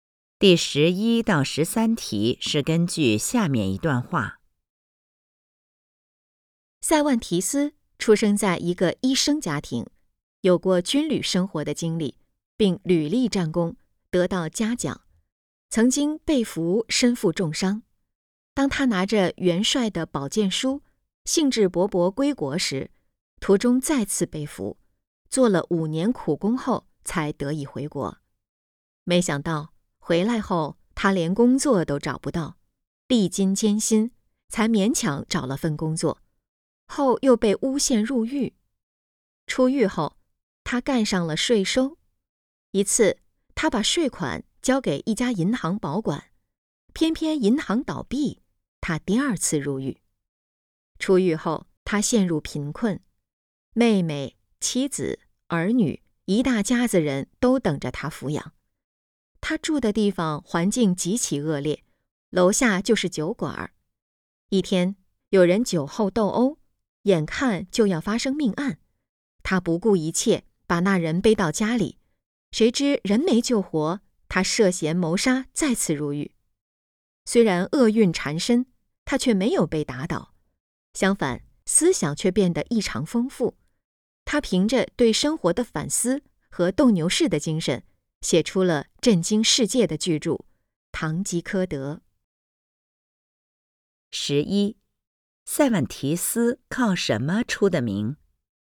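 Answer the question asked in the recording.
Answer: 写出了巨著《堂吉诃德》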